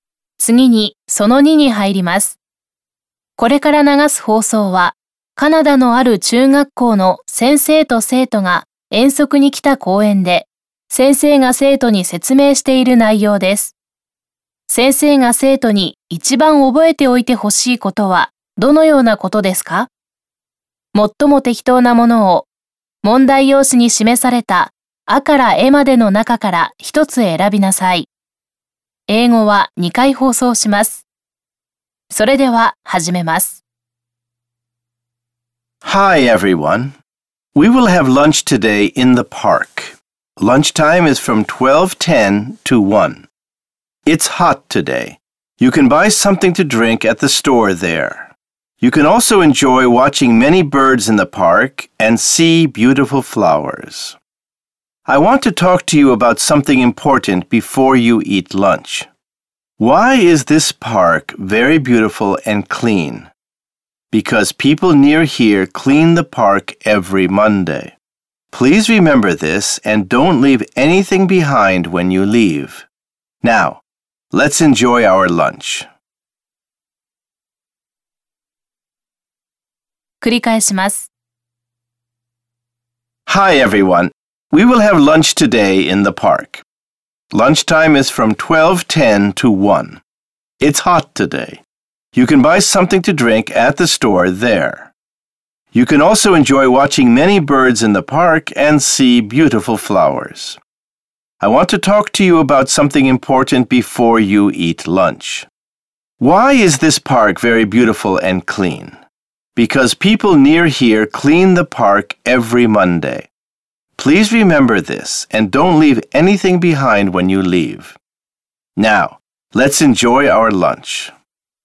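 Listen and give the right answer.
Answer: 公園を去るときに何も残していかないこと(ごみなどを置いていかない)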